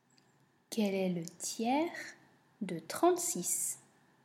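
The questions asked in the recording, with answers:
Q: Quel est le tiers de 36?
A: 12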